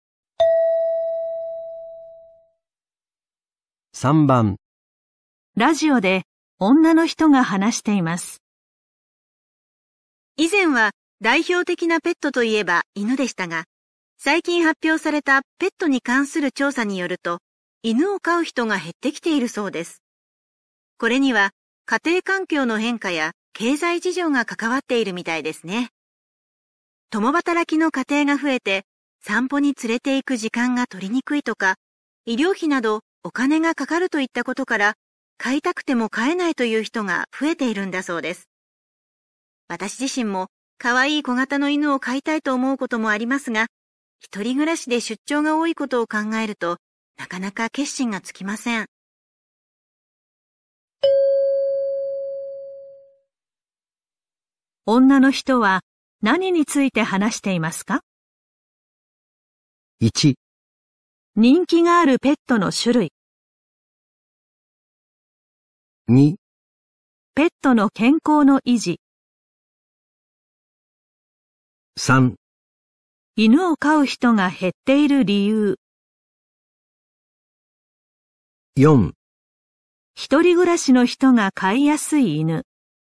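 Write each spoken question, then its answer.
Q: 女の人は何について話していますか?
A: 3: 犬を飼う人が減っている理由。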